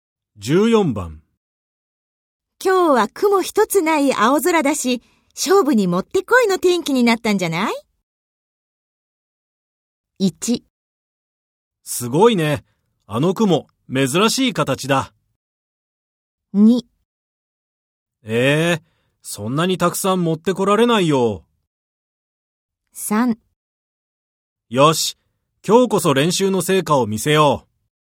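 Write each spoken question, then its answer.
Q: 今日は雲一つない青空だし、勝負にもってこいの天気になったんじゃない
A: 3: よし、今日こそ練習の成果を見せよう。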